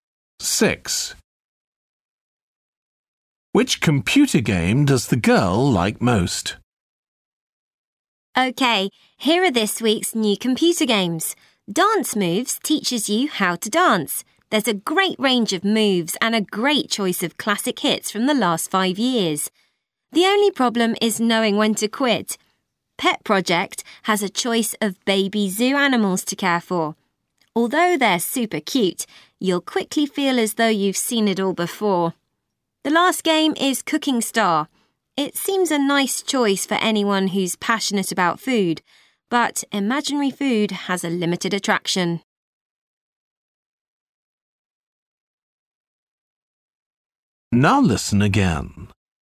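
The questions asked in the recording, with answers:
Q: Which computer game does the girl like most?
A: Dance Moves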